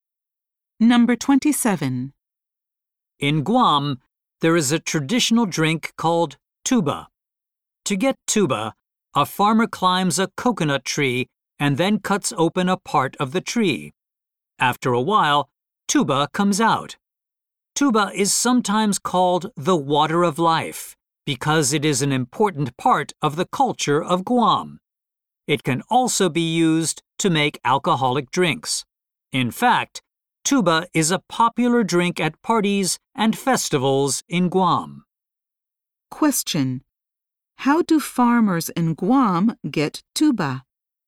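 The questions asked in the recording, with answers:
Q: How do farmers in Guam get tuba?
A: They climb a coconut tree and cut open part of it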